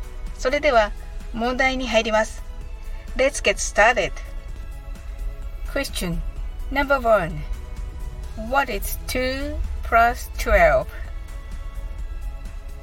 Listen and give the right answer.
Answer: The answer is 14.